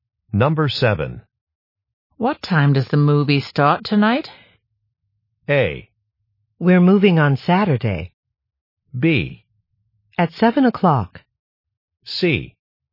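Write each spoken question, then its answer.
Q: What time does the movie start tonight?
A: B: At 7 o'clock.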